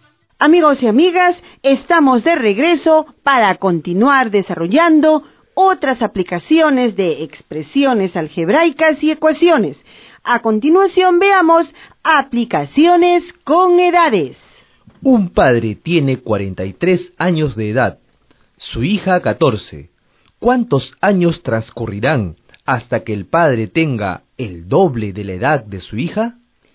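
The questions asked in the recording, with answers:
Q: ¿Cuántos años transcurrirán hasta que el padre tenga el doble de la edad de su hija?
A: 15 años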